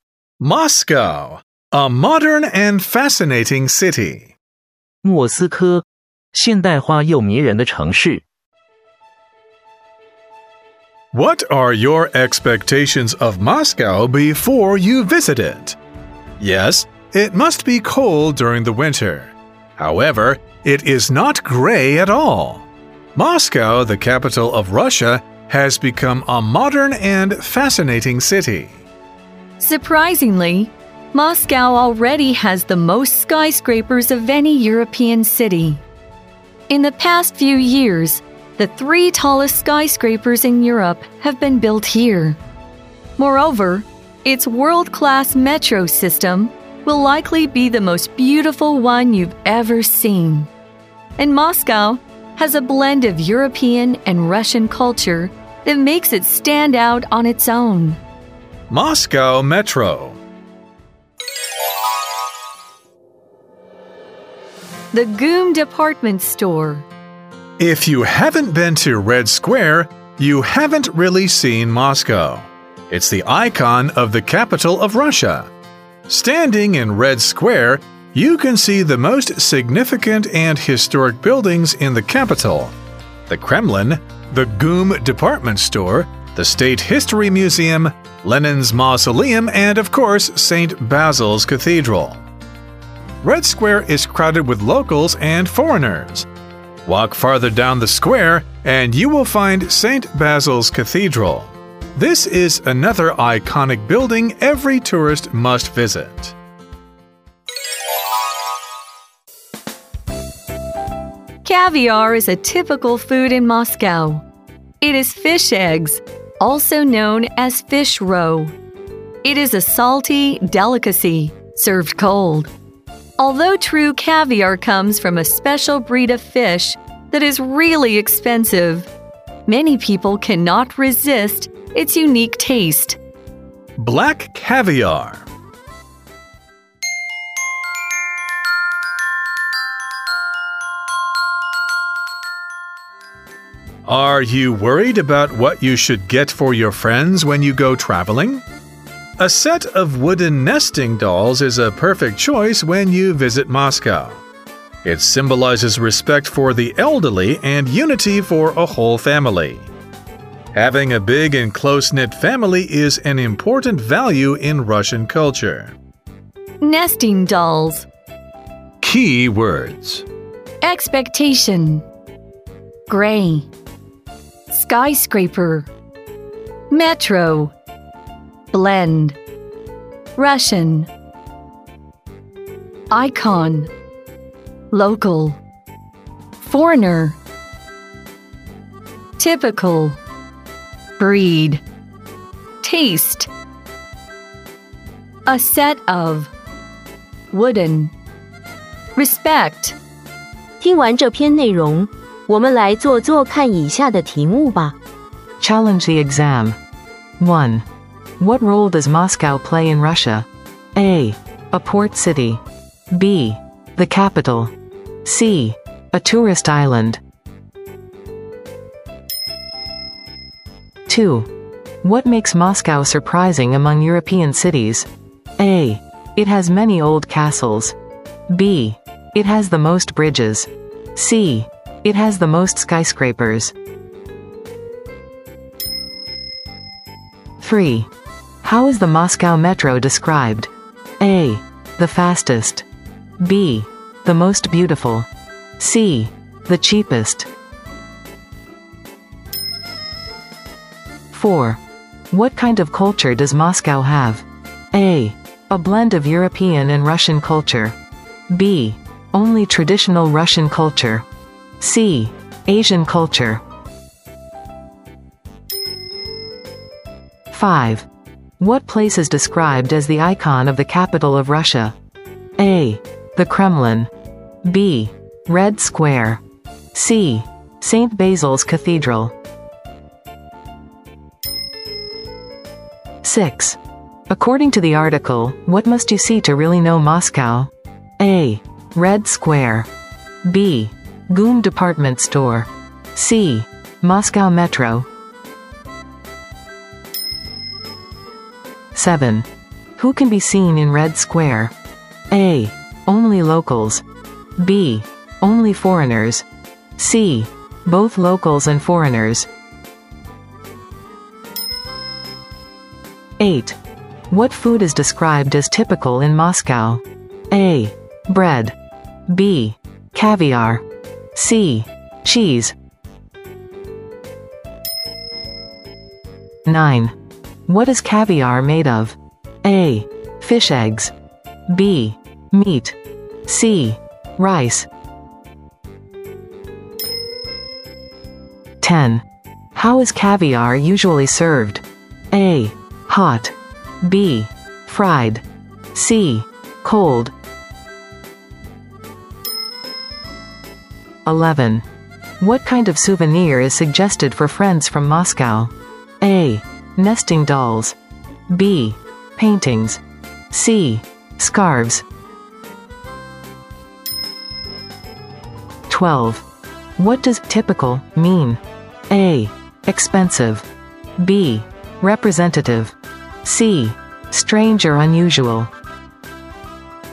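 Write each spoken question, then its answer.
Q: What role does Moscow play in Russia?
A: B: The capital.

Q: What makes Moscow surprising among European cities?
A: C: It has the most skyscrapers.

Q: How is the Moscow metro described?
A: B: The most beautiful.

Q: What kind of culture does Moscow have?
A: A: A blend of European and Russian culture.

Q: What place is described as the icon of the capital of Russia?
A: B: Red Square.

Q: According to the article, what must you see to really know Moscow?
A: A: Red Square.

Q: Who can be seen in Red Square?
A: C: Both locals and foreigners.

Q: What food is described as typical in Moscow?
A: B: Caviar.

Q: What is caviar made of?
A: A: Fish eggs.

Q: How is caviar usually served?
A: C: Cold.

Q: What kind of souvenir is suggested for friends from Moscow?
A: A: Nesting dolls.

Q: What does typical mean?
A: B: Representative.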